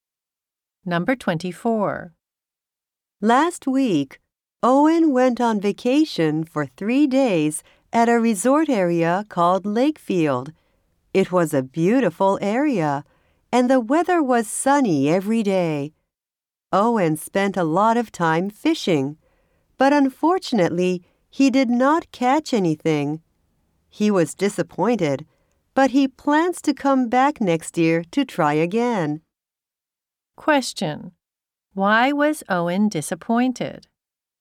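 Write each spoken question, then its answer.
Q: Why was Owen disappointed?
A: He did not catch any fish.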